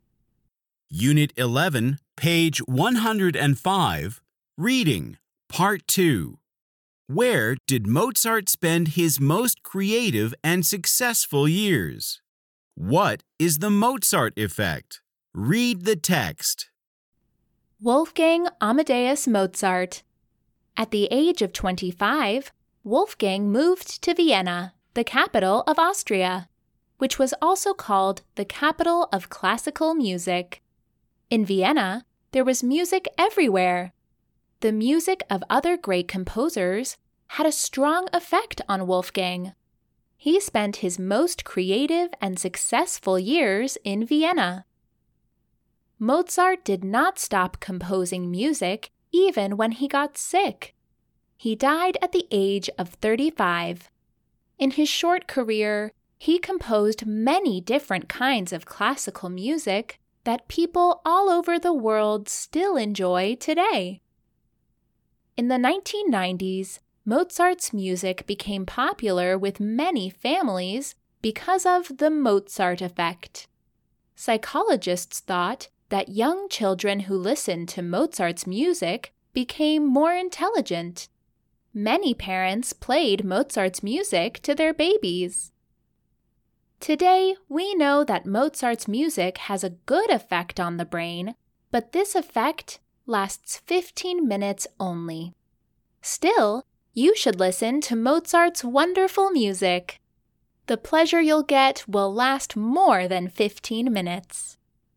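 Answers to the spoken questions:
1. In Vienna
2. The idea that young children who listened to Mozart's music became more intelligent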